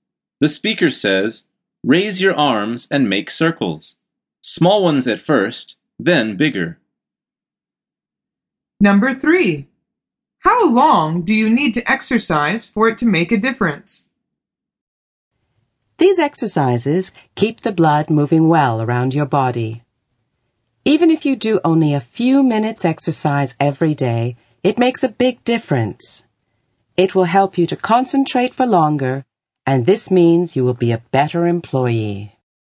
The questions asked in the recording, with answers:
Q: How long do you need to exercise for it to make a difference?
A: The answer is only a few minutes.